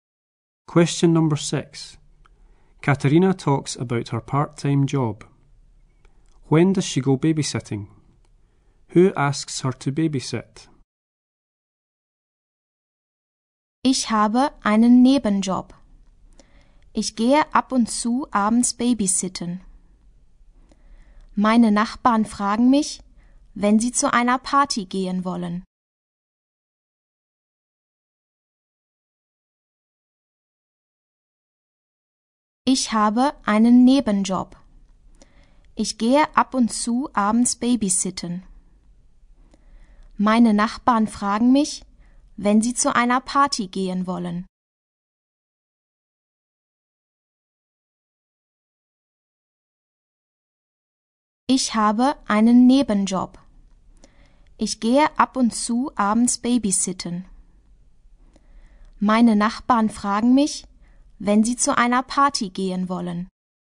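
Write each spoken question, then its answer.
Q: When does she go babysitting?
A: Now and again in the evenings

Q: Who asks her to babysit?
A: Her neighbours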